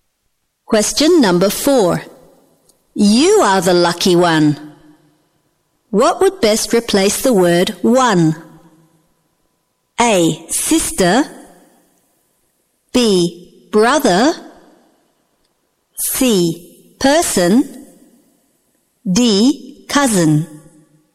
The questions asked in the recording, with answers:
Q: What would best replace the word one?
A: C. Person.